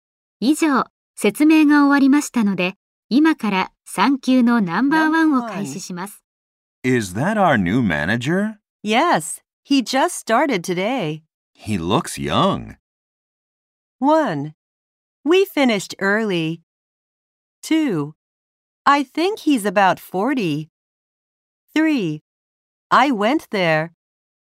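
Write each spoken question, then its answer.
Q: He looks young.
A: 2: I think he's about 40.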